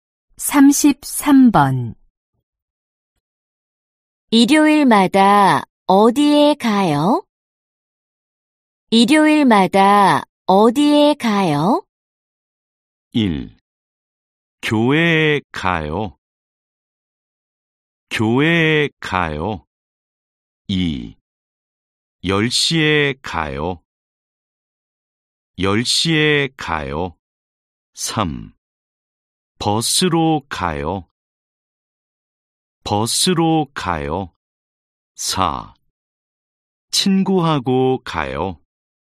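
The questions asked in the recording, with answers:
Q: 일요일마다 어디에 가요?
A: 1: 교회에 가요.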